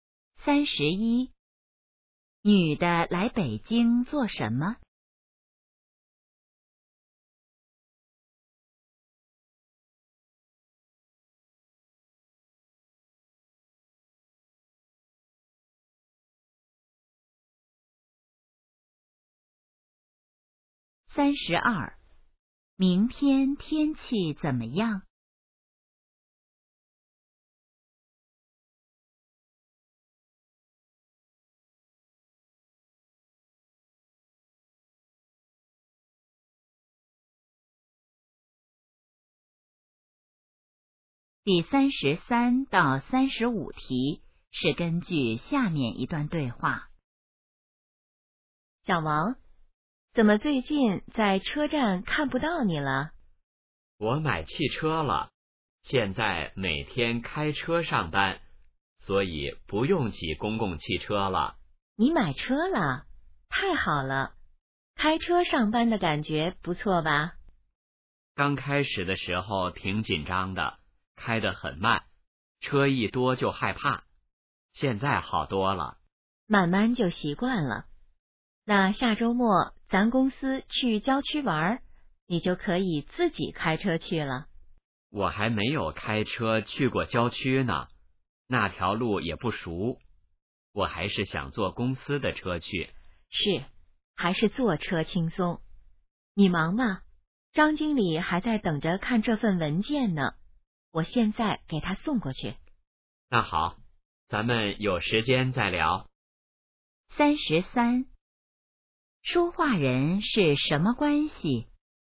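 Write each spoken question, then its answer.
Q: 说话人是什么关系?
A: 同事

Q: 男的下周末要做什么?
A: 和公司去郊区玩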